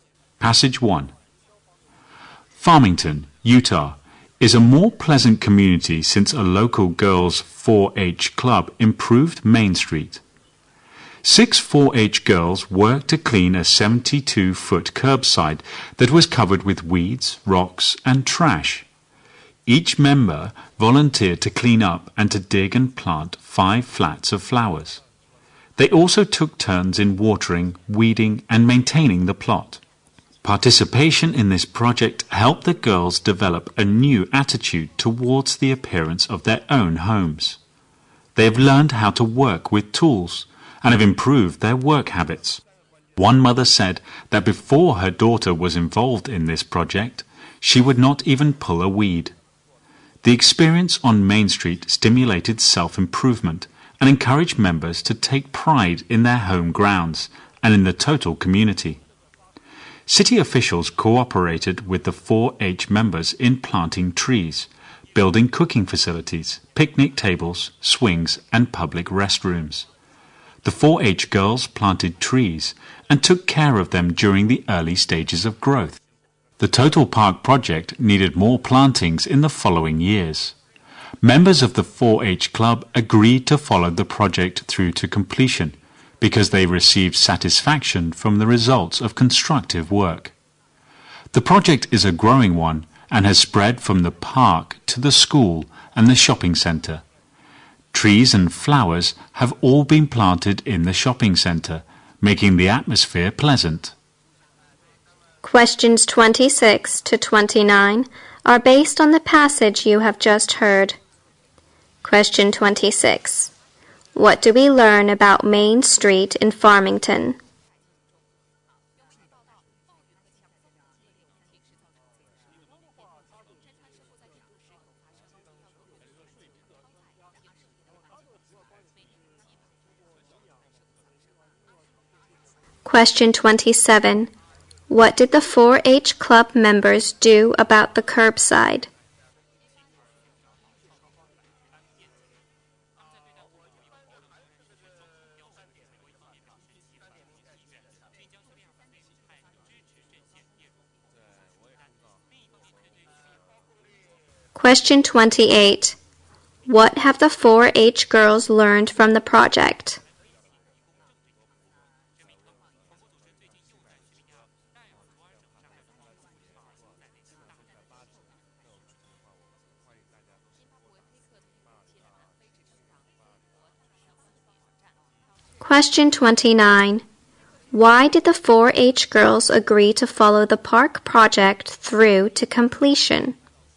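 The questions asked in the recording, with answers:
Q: What do we learn about Main Street in Farmington?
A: A local girls' 4-H club improved it and made it more pleasant.

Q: What did the 4-H Club members do about the curbside?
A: They cleaned it up and planted flowers there.

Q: What have the 4-H girls learned from the project?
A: How to work with tools; they also improved their work habits.

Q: Why did the 4-H girls agree to follow the park project through to completion?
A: Constructive work gave them satisfaction.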